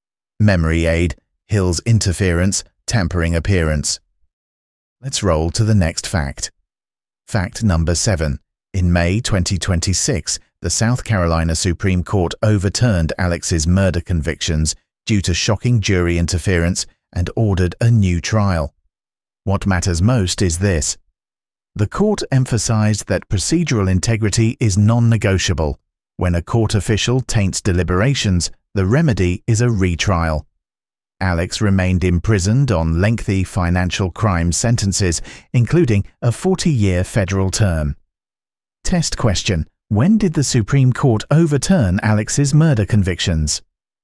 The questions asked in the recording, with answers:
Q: when did the Supreme Court overturn Alex's murder convictions?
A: May 2026.